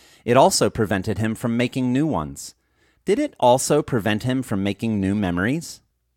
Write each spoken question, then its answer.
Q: Did it also prevent him from making new memories?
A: Yes, it also prevented him from making new memories.